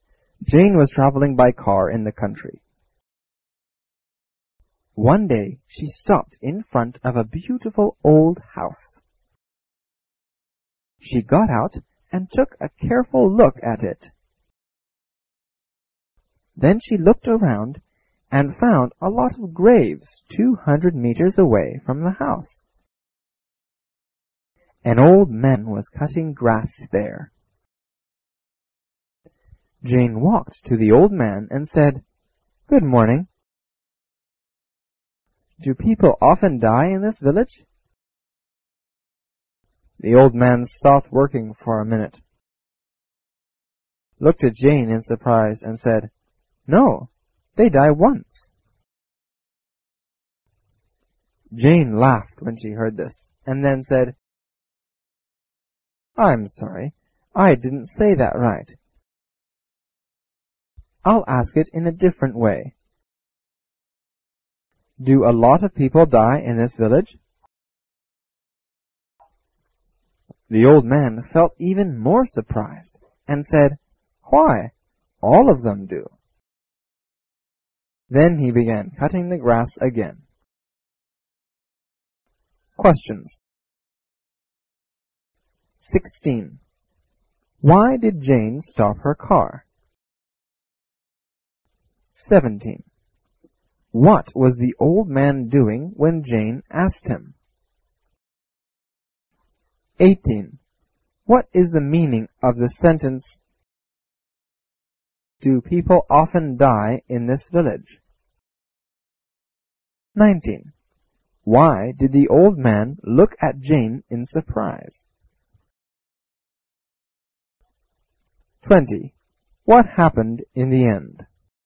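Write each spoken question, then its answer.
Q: Why did Jane stop her car?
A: She saw a beautiful old house

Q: What was the old man doing when Jane asked him?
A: Cutting grass

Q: What happened in the end?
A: The old man began cutting the grass again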